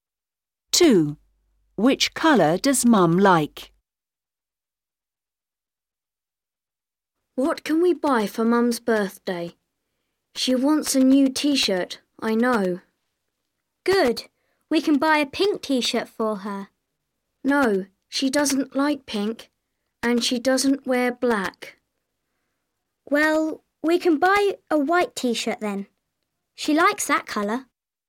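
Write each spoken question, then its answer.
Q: Which colour does Mum like?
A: white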